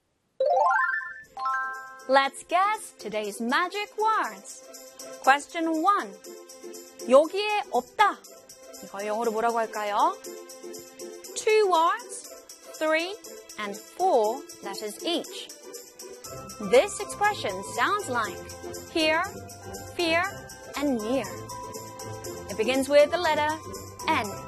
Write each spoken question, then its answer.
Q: 여기에 없다. 이걸 영어로 뭐라고 할까요?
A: 여기에 없다. In English is not here.